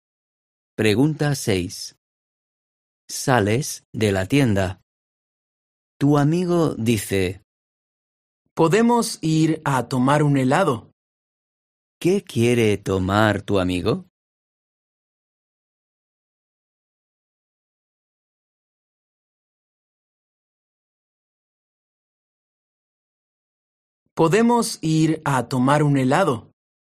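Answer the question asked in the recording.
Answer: un helado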